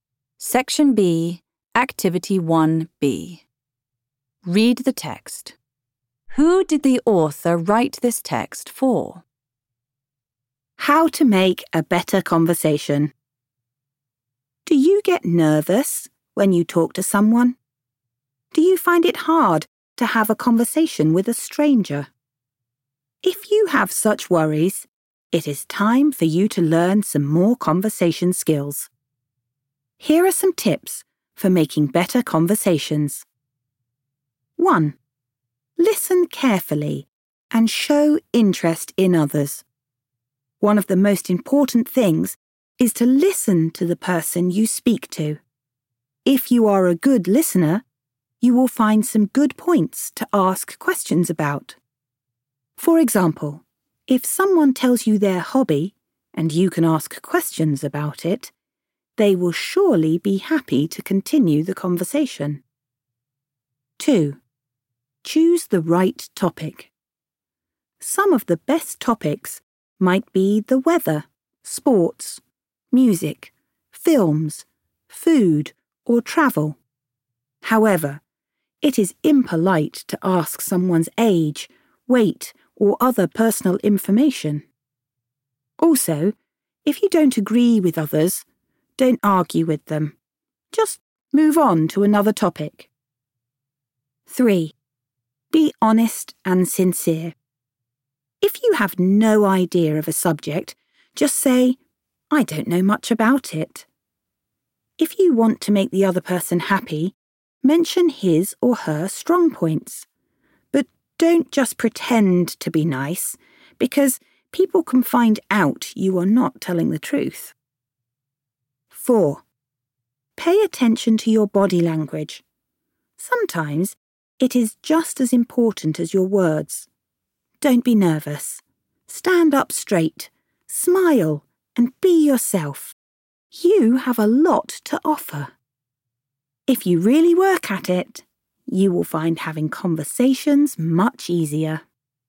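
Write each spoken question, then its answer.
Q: Who did the author write this text for?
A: People who get nervous talking to others or find it hard to have a conversation with a stranger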